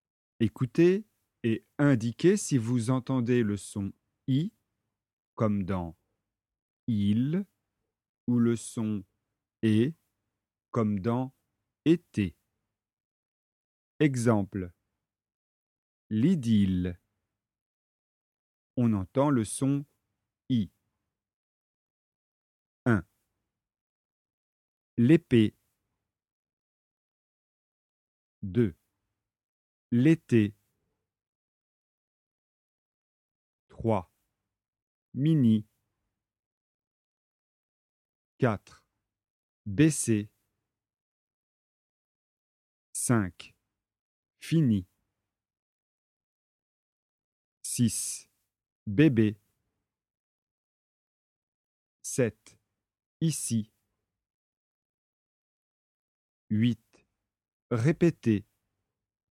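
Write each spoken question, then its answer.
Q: L'épée.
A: le son E

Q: L'été.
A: le son E

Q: Mini.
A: le son I

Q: Fini.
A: le son I

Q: Bébé.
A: le son E

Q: Répétez.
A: le son E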